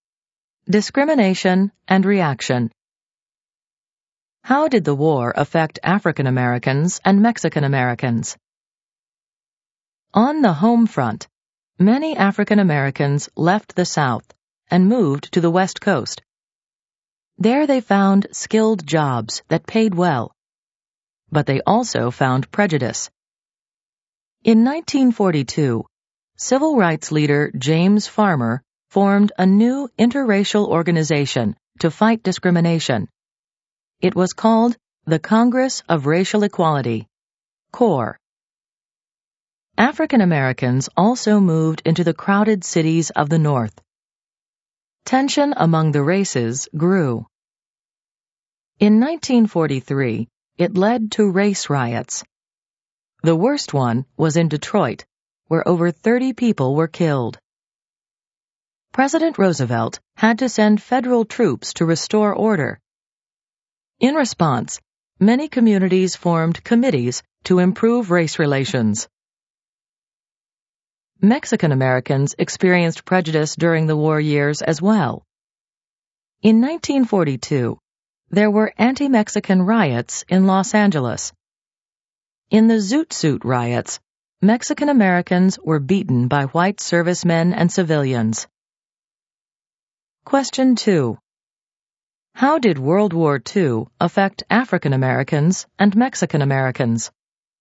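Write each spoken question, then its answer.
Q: How did World War II affect African Americans and Mexican Americans?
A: African Americans moved to the West and North for good jobs but met prejudice and race riots; Mexican Americans faced prejudice and the Zoot Suit riots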